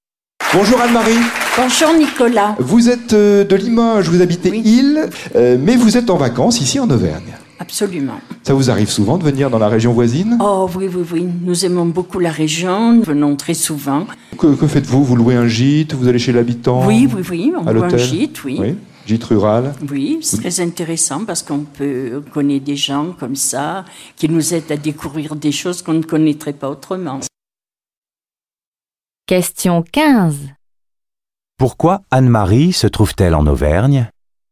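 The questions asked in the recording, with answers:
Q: Pourquoi Anne-Marie se trouve-t-elle en Auvergne ?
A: Elle est en vacances (dans un gîte rural).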